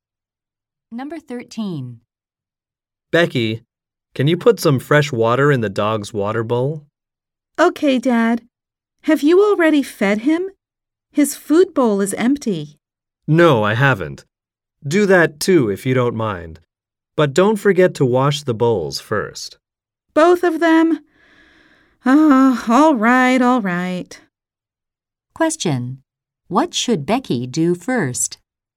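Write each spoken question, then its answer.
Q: What should Becky do first?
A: Wash the dog's bowls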